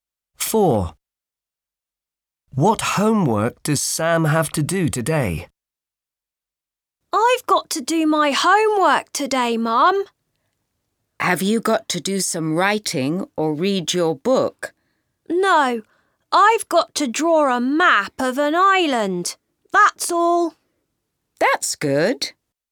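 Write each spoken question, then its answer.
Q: What homework does Sam have to do today?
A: draw a map of an island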